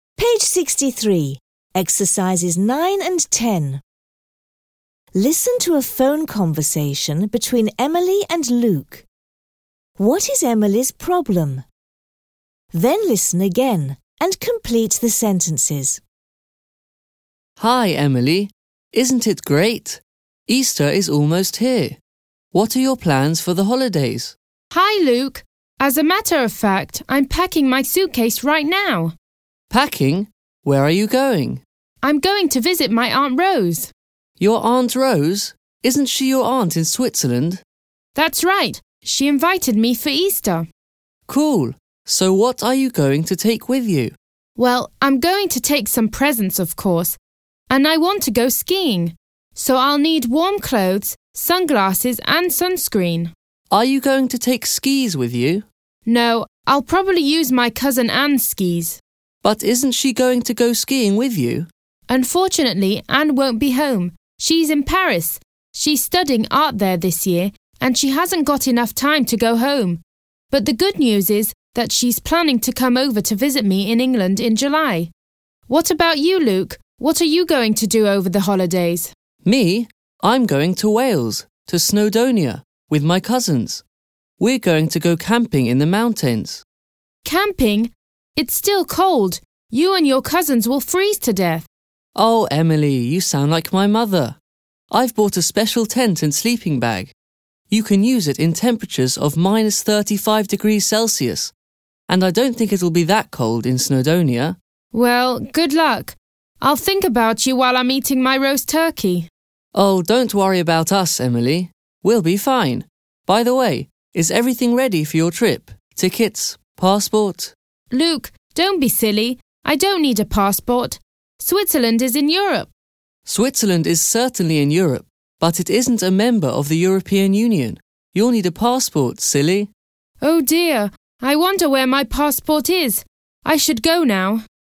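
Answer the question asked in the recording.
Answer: She needs a passport for Switzerland but doesn't know where it is.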